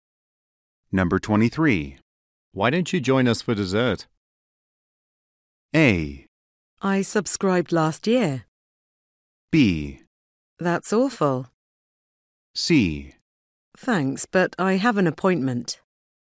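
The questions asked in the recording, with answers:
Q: Why don't you join us for dessert?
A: C: Thanks, but I have an appointment.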